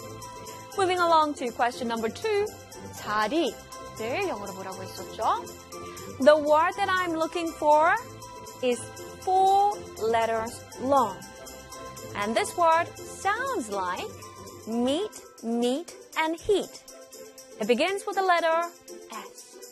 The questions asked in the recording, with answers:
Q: 자리. 늘 영어로 뭐라고 했었죠?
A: 자리 in English is S-E-A-T, seat.